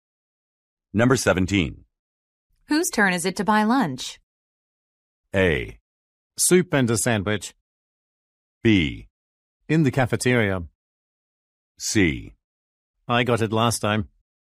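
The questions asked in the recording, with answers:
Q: Whose turn is it to buy lunch?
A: C: I got it last time.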